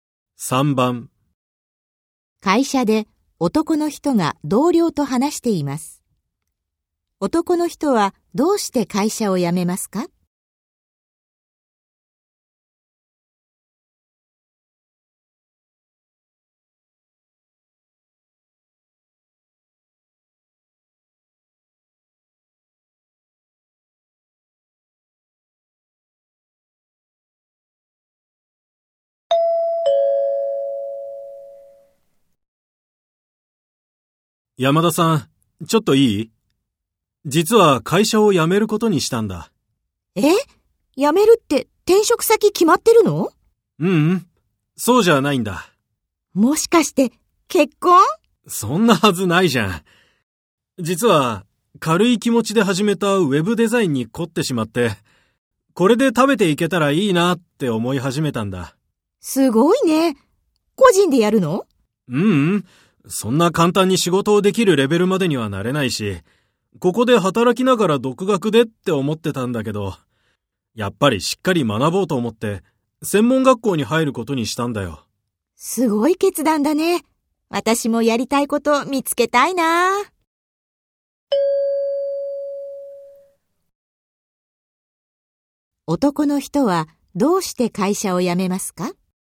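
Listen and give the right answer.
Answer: ウェブデザインをしっかり学ぶために専門学校に入るから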